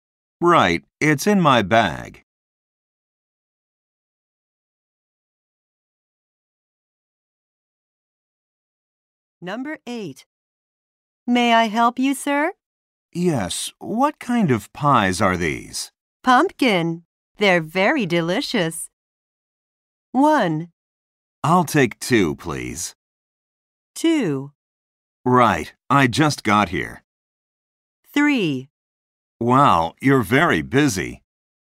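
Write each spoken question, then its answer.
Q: Pumpkin. They're very delicious.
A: 1: I'll take 2, please.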